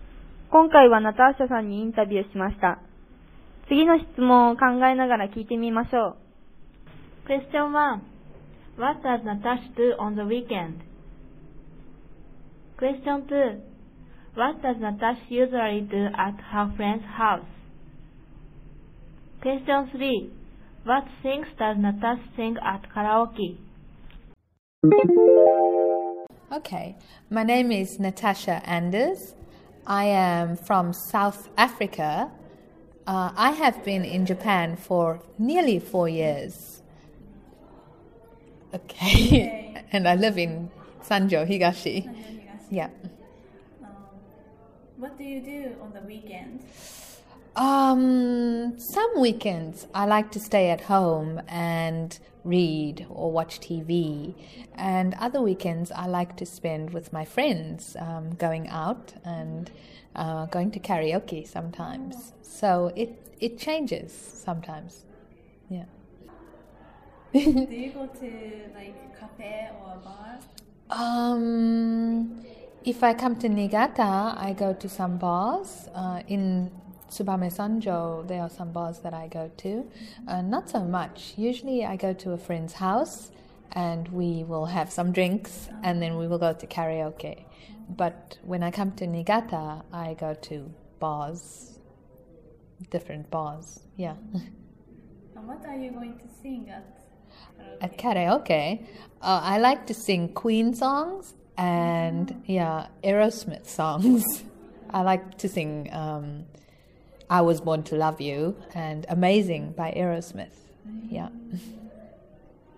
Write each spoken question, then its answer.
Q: What does Natasha do on the weekend?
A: Some weekends she spends time reading or watching TV, and other weekends she likes to spend with her friends going out and going to karaoke sometimes.

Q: What does Natasha usually do at her friend's house?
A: She drinks and then goes to karaoke.